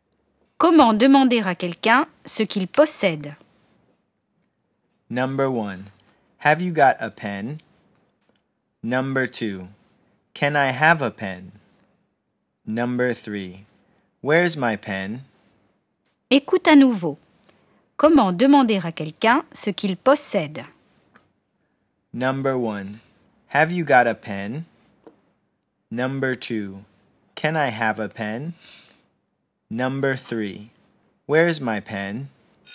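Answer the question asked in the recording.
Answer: 1: Have you got a pen?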